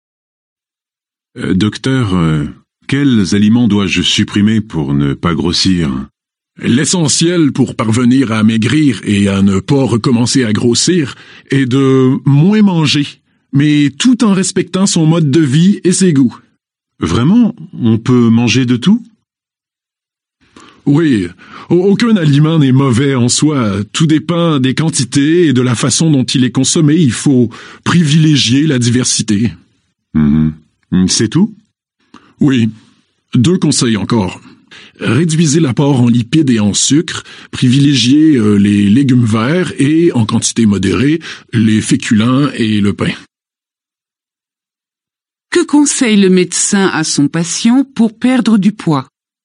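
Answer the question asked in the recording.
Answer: Manger moins, de tout et varié : réduire les lipides et le sucre, privilégier les légumes verts, des féculents et du pain en quantité modérée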